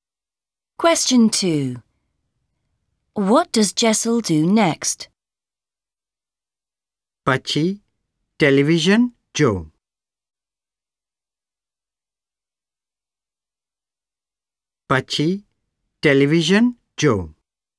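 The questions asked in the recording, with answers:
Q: What does Jessel do next?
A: Watches television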